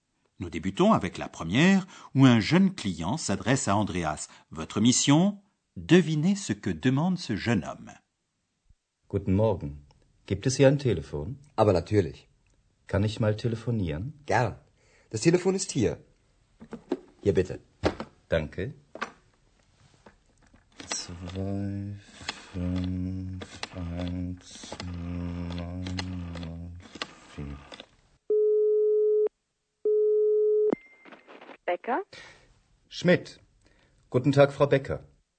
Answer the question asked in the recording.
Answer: Le jeune homme demande où il y a un téléphone.